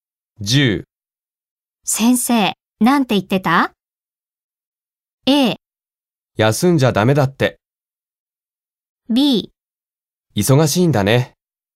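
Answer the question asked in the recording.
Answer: A: 休んじゃダメだって。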